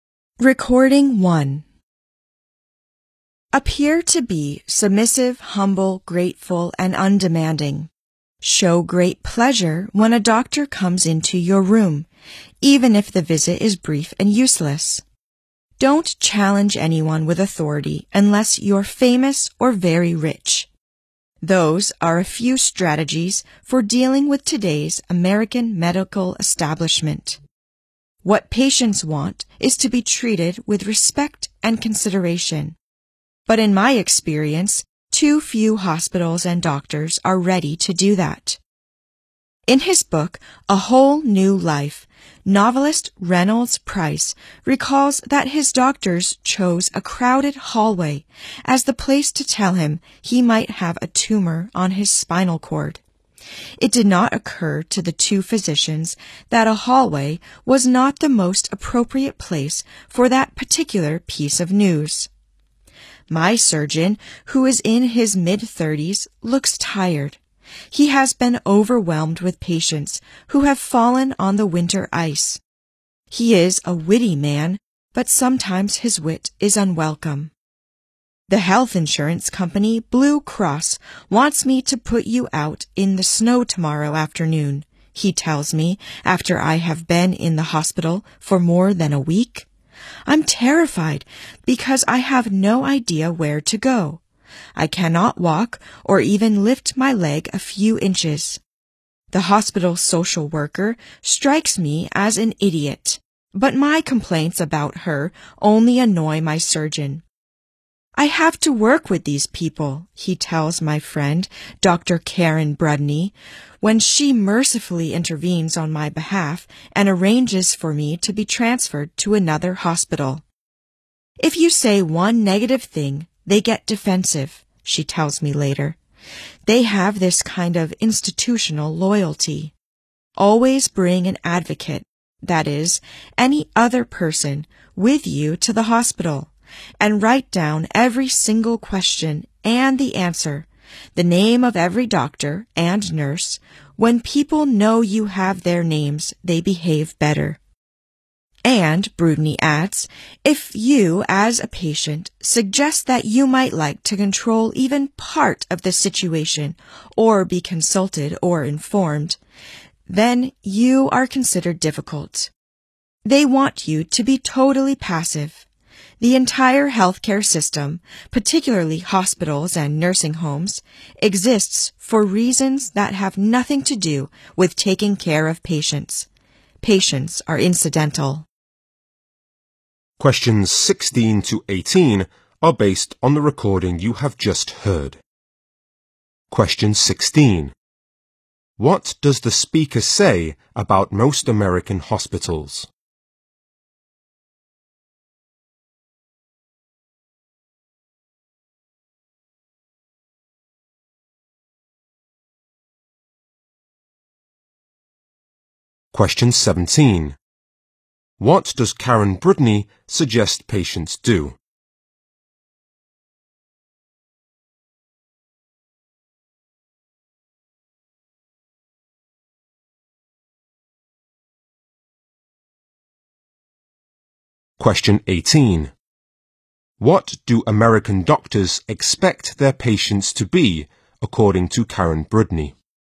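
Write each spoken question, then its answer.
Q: What does the speaker say about most American hospitals?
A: Too few treat patients with respect and consideration.

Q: What does Karen Brudney suggest patients do?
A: Always bring an advocate, and write down every question, answer and name.

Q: What do American doctors expect their patients to be, according to Karen Brudney?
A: Totally passive.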